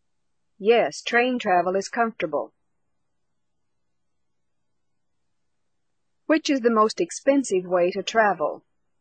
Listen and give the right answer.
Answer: The most expensive way to travel is by plane.